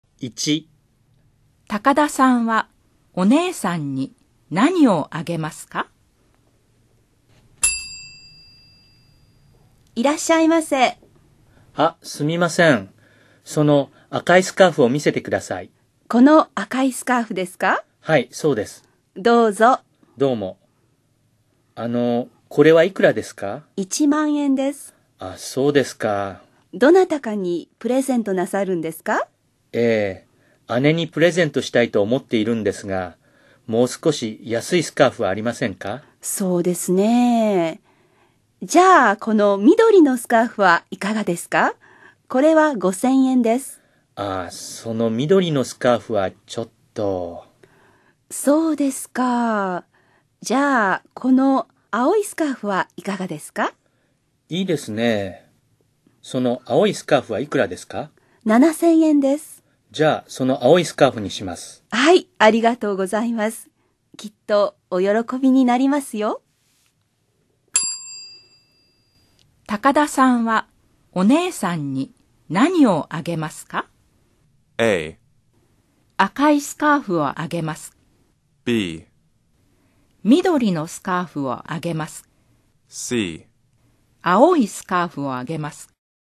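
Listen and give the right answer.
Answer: C: 青いスカーフをあげます。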